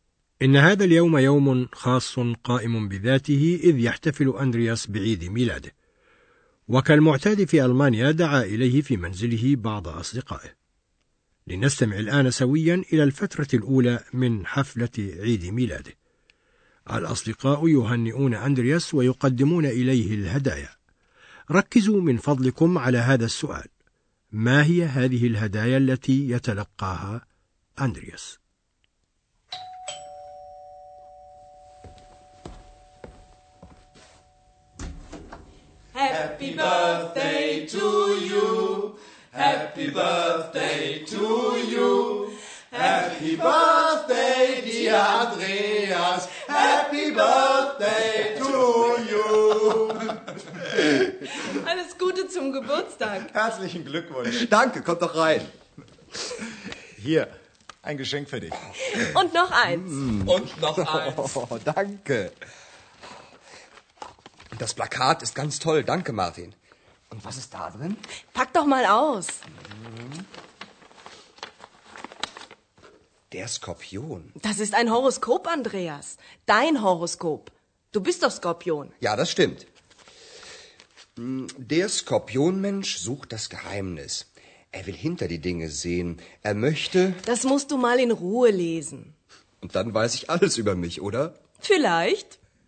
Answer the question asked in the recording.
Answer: يفتح أندرياس هديتين من الهدايا وكانتا صورة تلصق على الحائط ونصا يتناول برجه المولود تحته